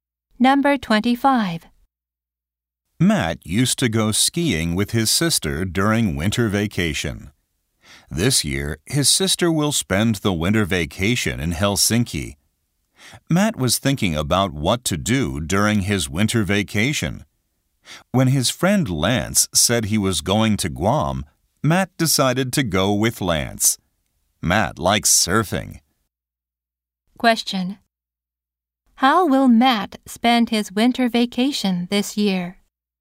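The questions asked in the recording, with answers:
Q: Question.How will Matt spend his winter vacation this year?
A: He will go to Guam with Lance.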